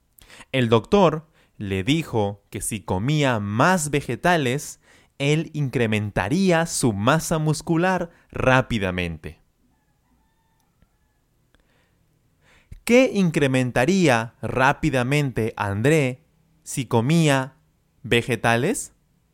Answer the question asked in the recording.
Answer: su masa muscular. Su masa muscular.